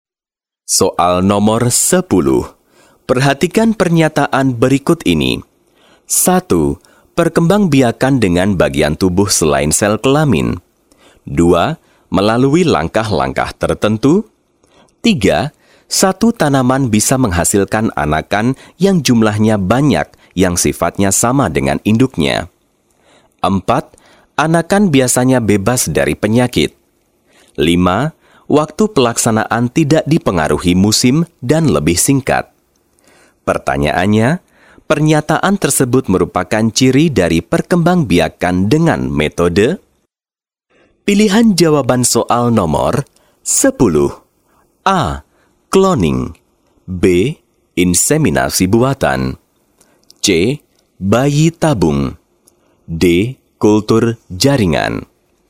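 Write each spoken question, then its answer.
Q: Pertanyaannya, pernyataan tersebut merupakan ciri dari perkembangbiakan dengan metode?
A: D: Kultur jaringan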